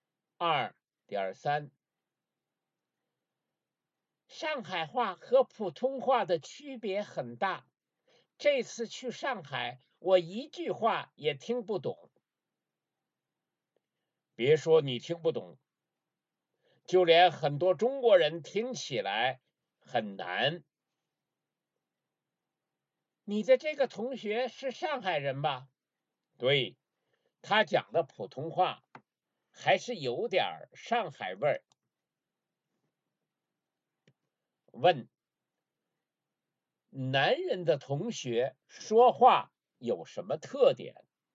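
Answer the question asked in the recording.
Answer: 讲的普通话有点上海味儿(有上海口音)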